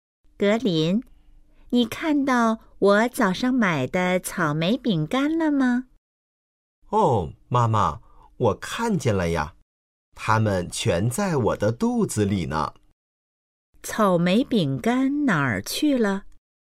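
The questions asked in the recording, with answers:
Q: 草莓饼干哪儿去了?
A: 被格林吃了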